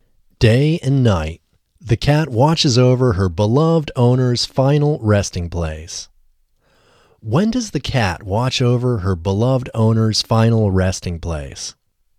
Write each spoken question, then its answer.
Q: When does the cat watch over her beloved owner's final resting place?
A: The cat watches over her beloved owner's final resting place day and night.